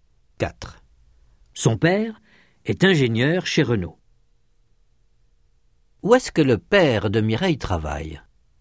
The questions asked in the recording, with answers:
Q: Où est-ce que le père de Mireille travaille?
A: Chez Renault.